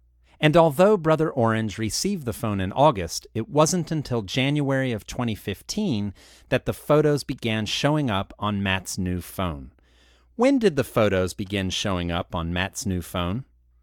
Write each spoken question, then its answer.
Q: When did the photos begin showing up on Matt's new phone?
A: They began showing up in January of 2015.